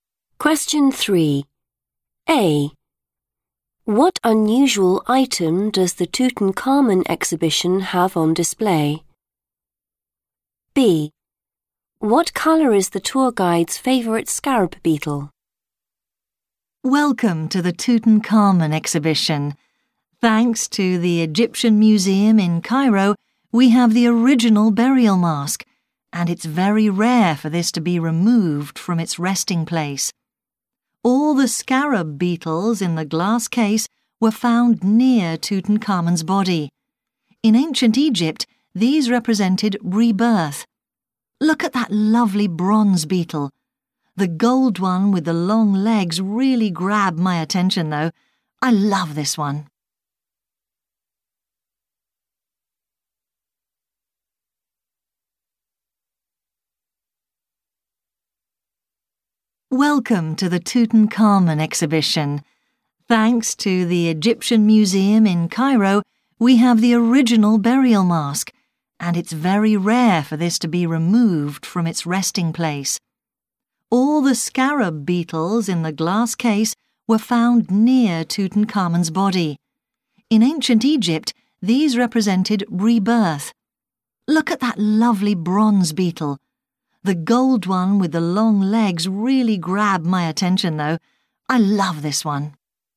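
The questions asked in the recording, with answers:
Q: What unusual item does the Tutankhamun exhibition have on display?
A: the original burial mask

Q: What colour is the tour guide's favourite scarab beetle?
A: gold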